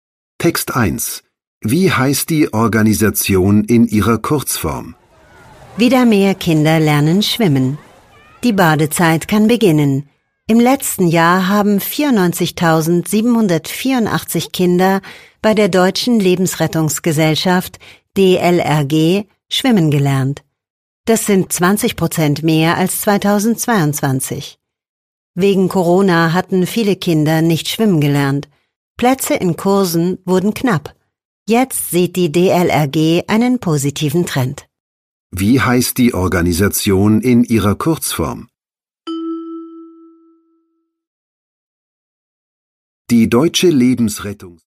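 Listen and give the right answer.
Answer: DLRG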